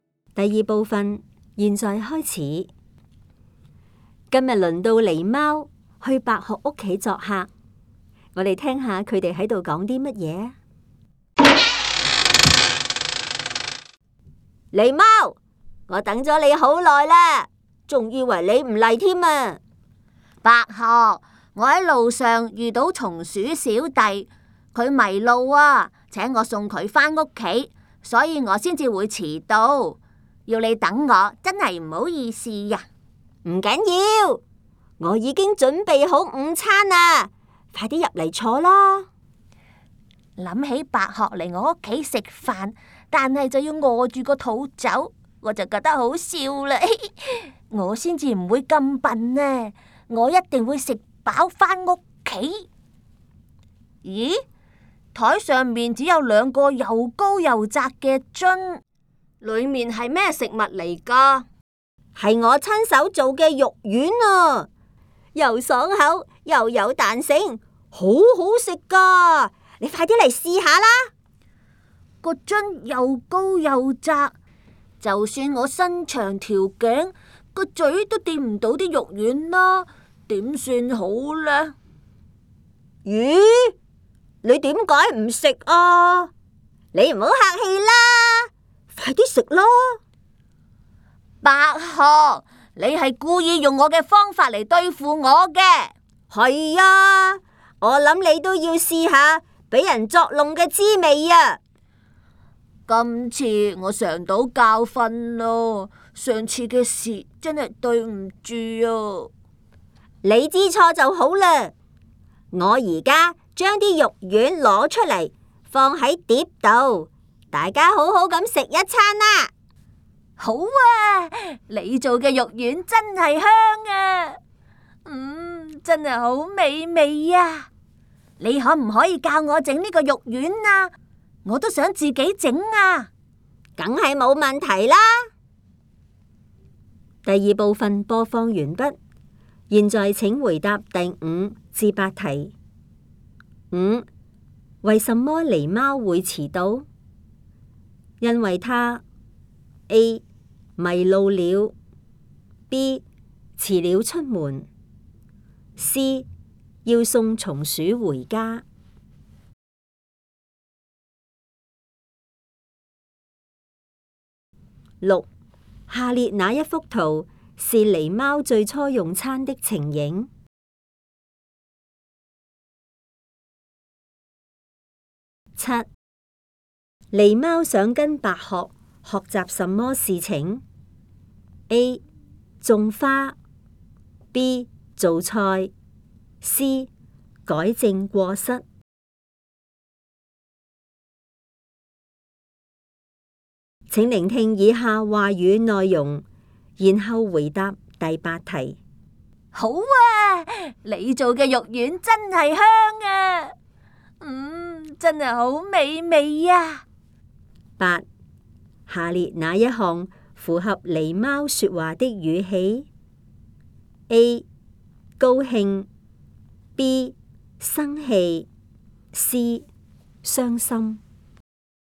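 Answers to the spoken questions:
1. C: 要送松鼠回家
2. B: 做菜
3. A: 高兴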